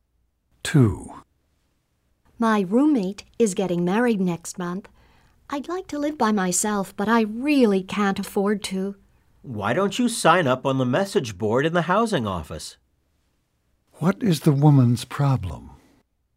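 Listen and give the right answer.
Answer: She wants to live alone but can't afford it, as her roommate is getting married.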